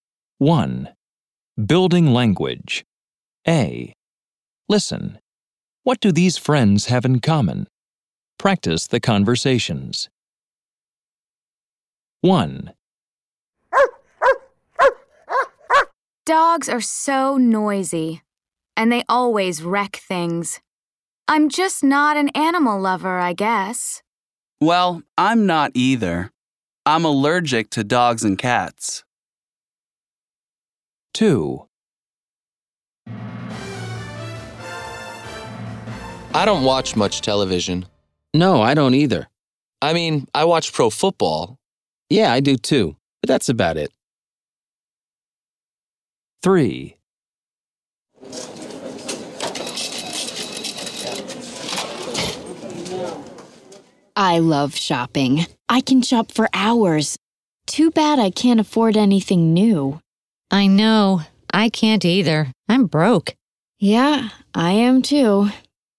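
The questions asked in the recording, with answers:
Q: What do these friends have in common?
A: Neither of them is an animal lover.

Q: What do these friends have in common?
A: They don't watch much TV, only pro football.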